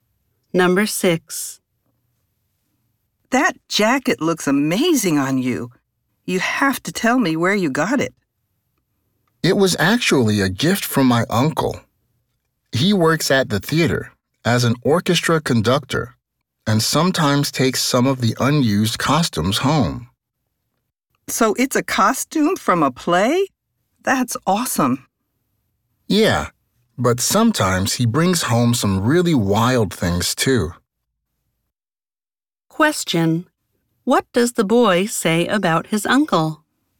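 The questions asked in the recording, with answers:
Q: What does the boy say about his uncle?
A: He works at the theater as an orchestra conductor and sometimes takes unused costumes home.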